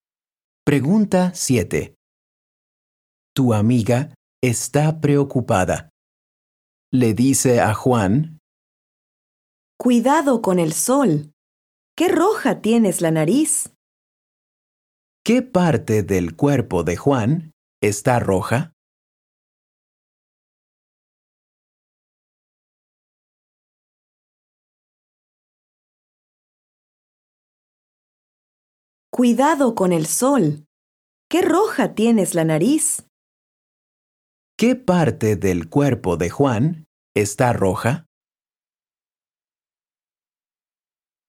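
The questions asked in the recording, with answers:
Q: ¿Qué parte del cuerpo de Juan está roja?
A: La nariz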